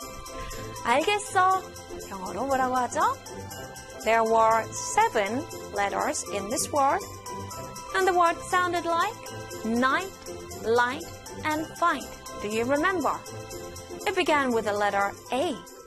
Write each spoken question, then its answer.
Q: 알겠어. 영어로 뭐라고 하죠?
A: A-L-R-I-G-H-T. All right.